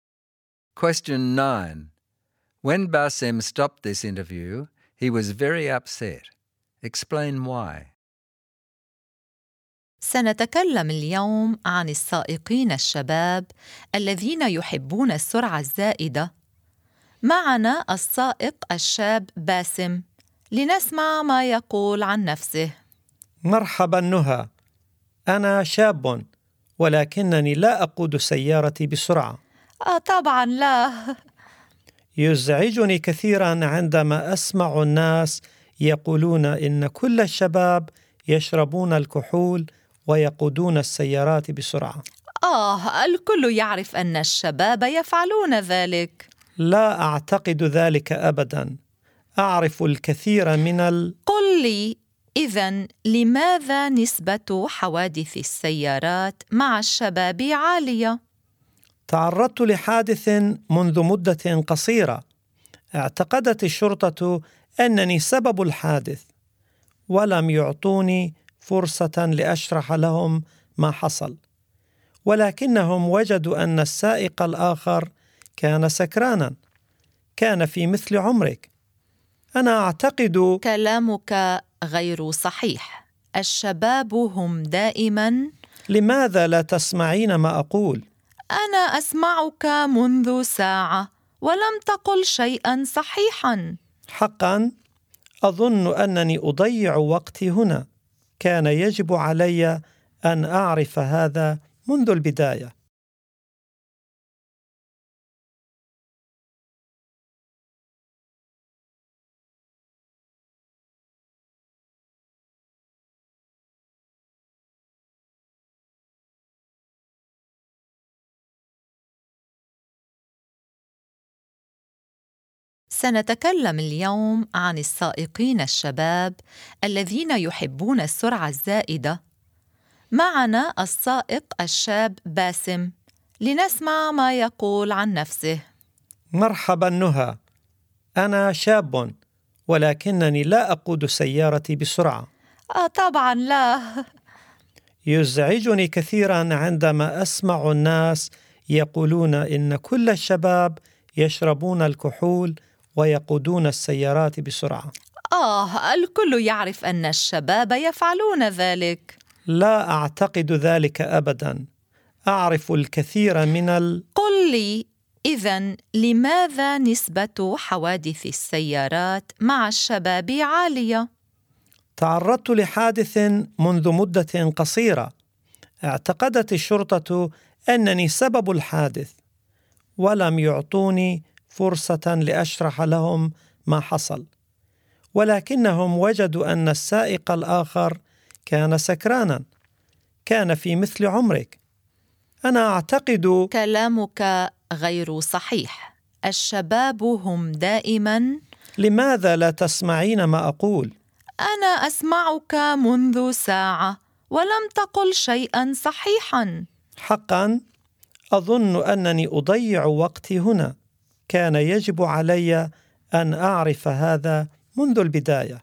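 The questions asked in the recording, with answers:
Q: When Bassem stopped this interview, he was very upset.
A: The interviewer kept stereotyping young drivers, would not listen to him and said nothing he said was true, so he felt he was wasting his time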